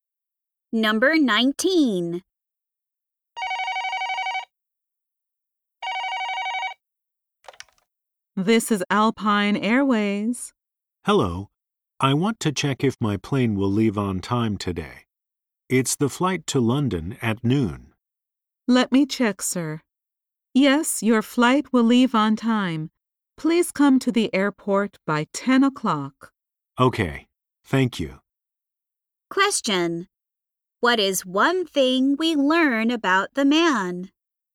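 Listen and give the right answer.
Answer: He is flying to London at noon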